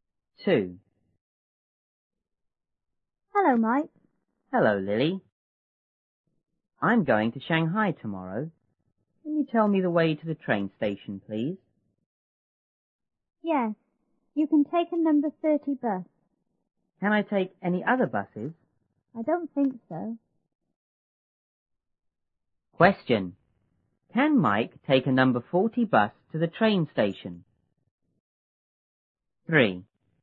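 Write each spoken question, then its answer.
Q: Can Mike take a number 40 bus to the train station?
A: No, he can't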